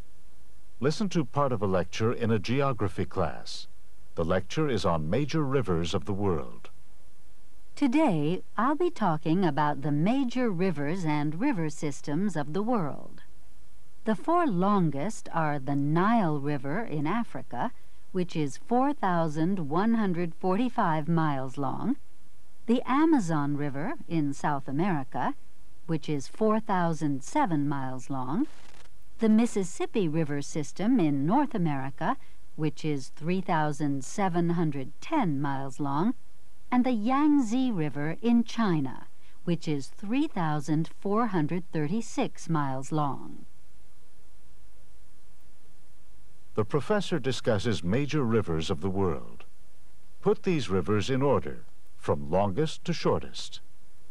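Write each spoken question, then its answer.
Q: Put these rivers in order, from longest to shortest.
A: Nile, Amazon, Mississippi, Yangtze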